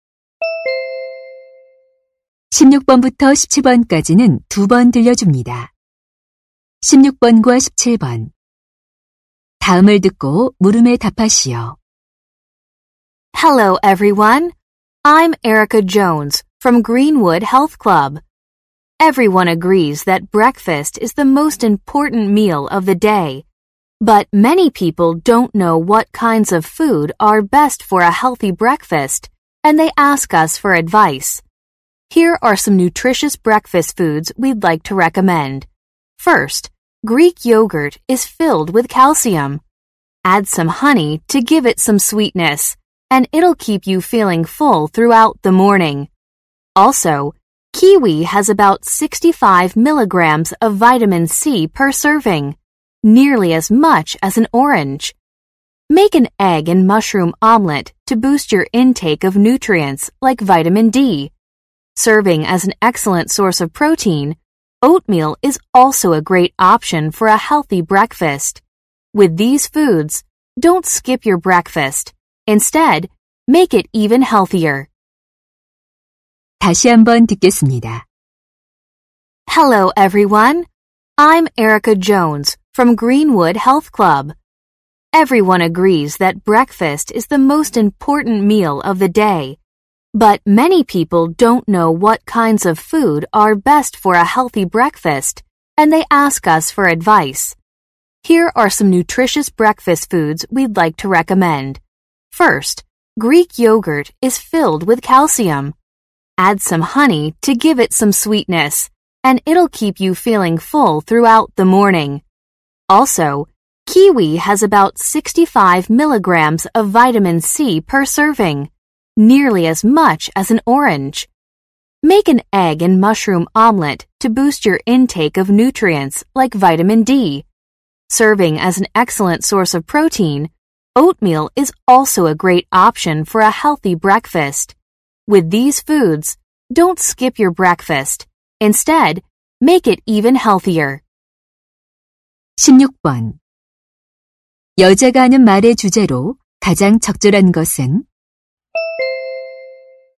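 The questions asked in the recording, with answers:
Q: 여자가 하는 말의 주제로 가장 적절한 것은?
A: 건강한 아침 식사를 위한 음식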